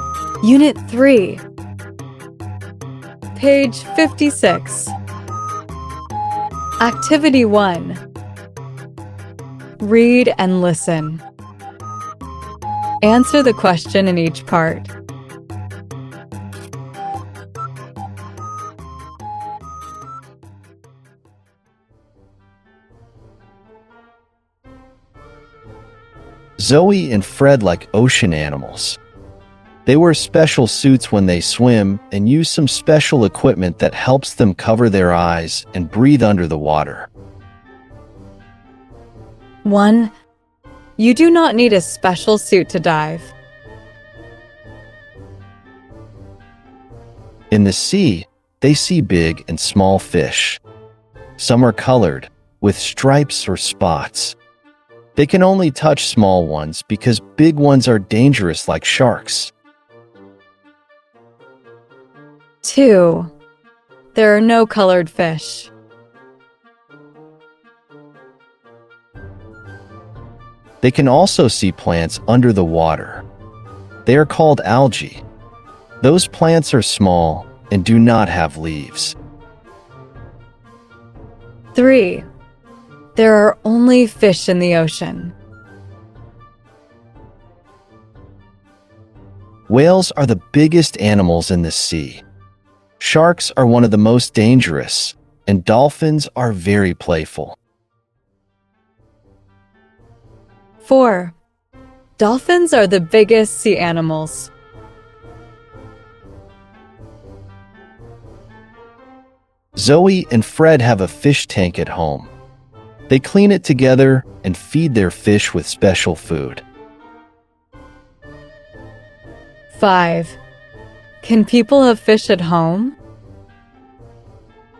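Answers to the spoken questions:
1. False
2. False
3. False
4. False
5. Yes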